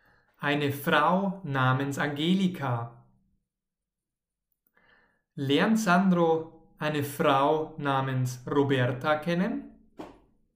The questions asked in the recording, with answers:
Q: Lernt Sandro eine Frau namens Roberta kennen?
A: Nein, er lernt natürlich keine Frau namens Roberta kennen.